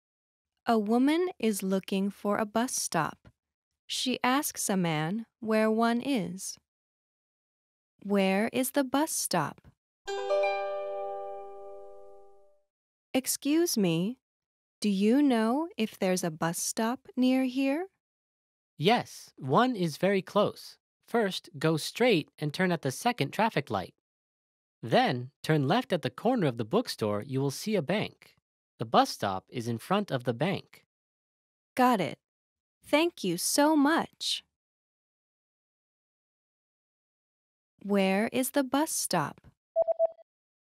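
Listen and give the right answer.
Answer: In front of the bank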